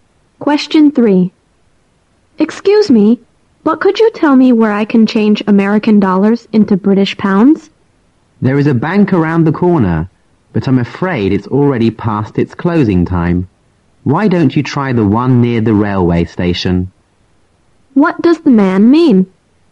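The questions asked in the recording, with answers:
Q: What does the man mean?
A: The nearby bank is closed, so the woman should try the bank near the railway station.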